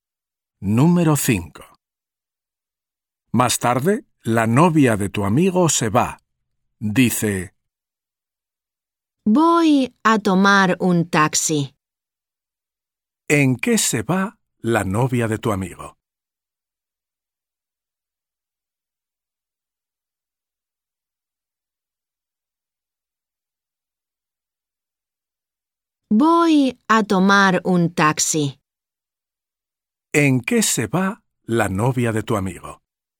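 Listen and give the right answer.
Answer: en taxi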